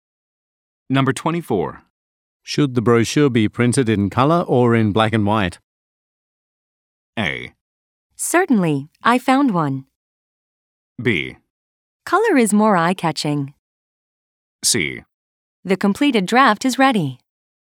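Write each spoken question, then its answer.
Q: Should the brochure be printed in color or in black and white?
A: B: Color is more eye-catching.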